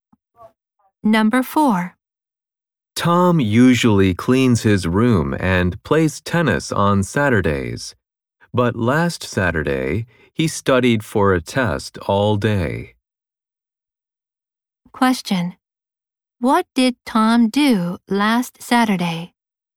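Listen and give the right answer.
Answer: He studied for a test all day.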